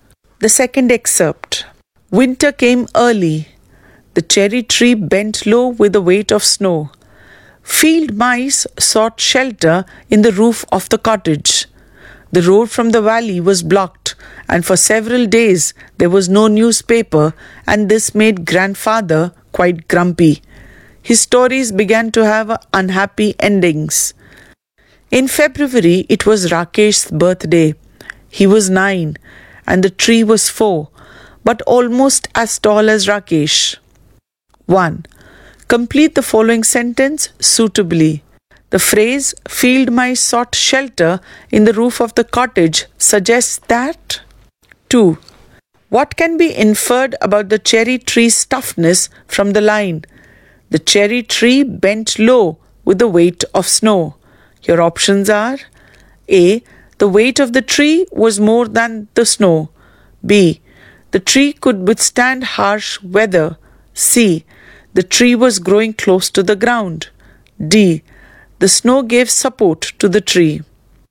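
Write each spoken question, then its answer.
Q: What can be inferred about the cherry tree's toughness from the line?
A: B: The tree could withstand harsh weather.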